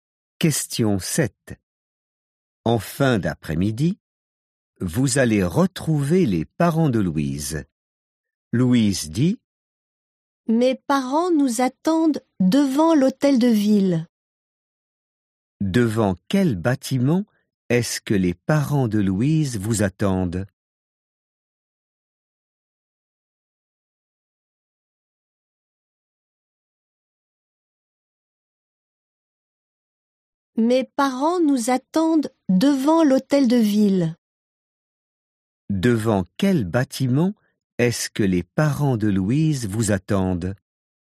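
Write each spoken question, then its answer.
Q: Devant quel bâtiment est-ce que les parents de Louise vous attendent?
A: Devant l'hôtel de ville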